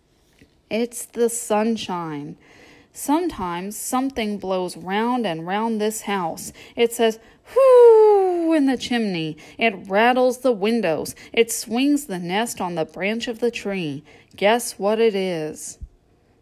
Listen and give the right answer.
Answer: It's the wind.